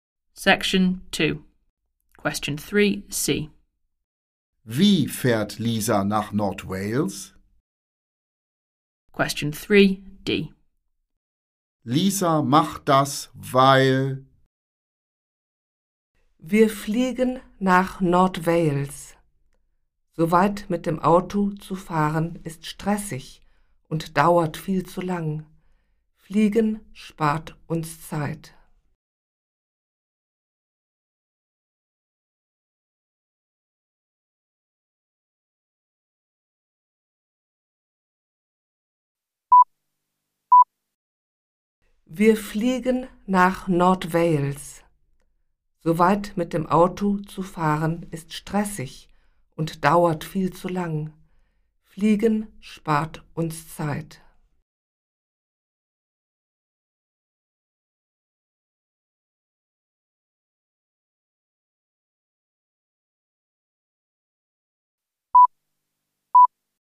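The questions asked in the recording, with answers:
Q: Wie fährt Lisa nach North Wales?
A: Sie fliegt

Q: Lisa macht das, weil...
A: Fliegen spart Zeit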